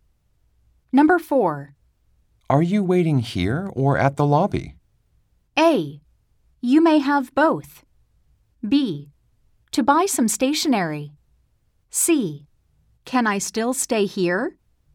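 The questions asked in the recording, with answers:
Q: Are you waiting here or at the lobby?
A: C: Can I still stay here?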